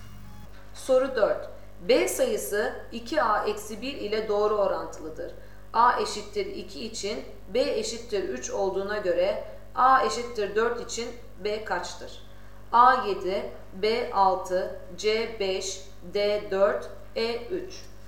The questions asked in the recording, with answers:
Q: A eşittir 2 için B eşittir 3 olduğuna göre A eşittir 4 için B kaçtır?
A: Doğru cevap A 7.